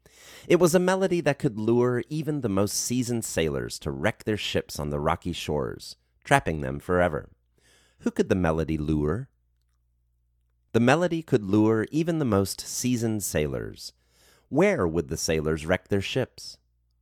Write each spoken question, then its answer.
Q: Where would the sailors wreck their ships?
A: The sailors would wreck their ships on the rocky shores.